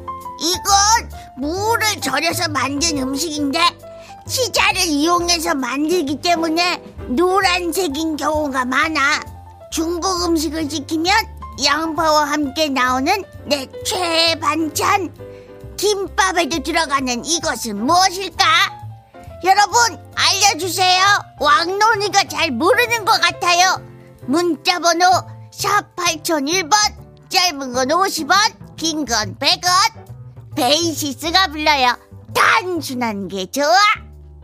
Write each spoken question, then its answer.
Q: 중국 음식을 시키면 양파와 함께 나오는 내 최애 반찬 김밥에도 들어가는 이것은 무엇일까?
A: 정답은 단무지입니다.